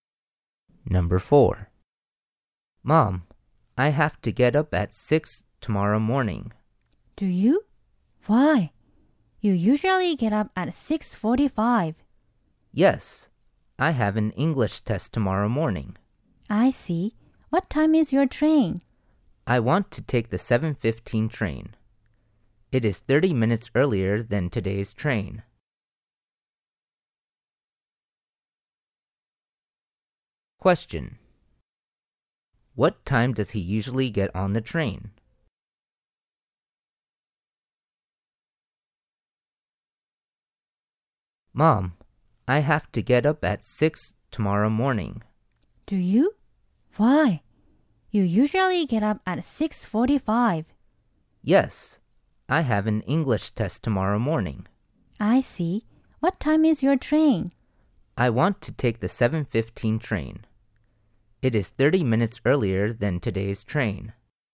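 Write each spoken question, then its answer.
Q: What time does he usually get on the train?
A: At 7:45.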